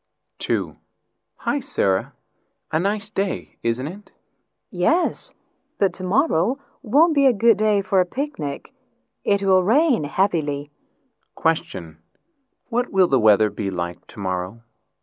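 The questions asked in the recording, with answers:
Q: What will the weather be like tomorrow?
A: It will rain heavily (rainy)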